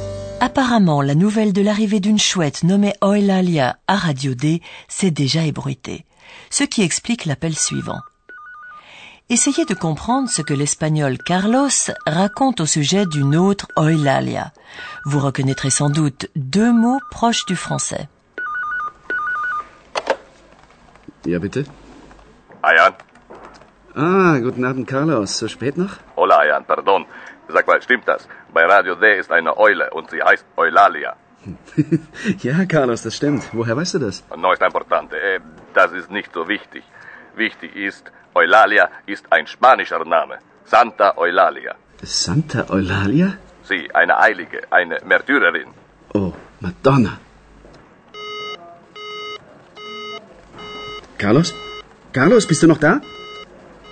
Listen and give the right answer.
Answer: Il parle de Santa Eulalia, qui est donc Sainte Eulalie.